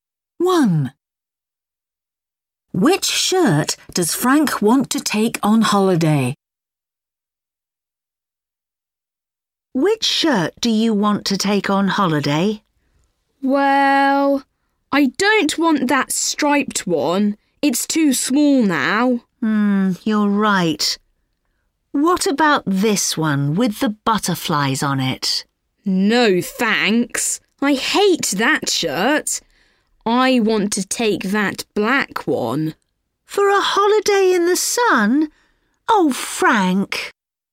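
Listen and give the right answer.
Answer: The black one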